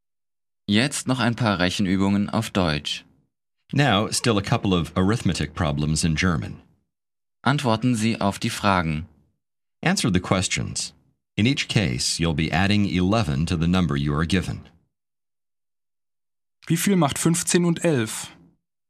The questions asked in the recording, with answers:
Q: Wie viel macht 15 und 11?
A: Sechsundzwanzig.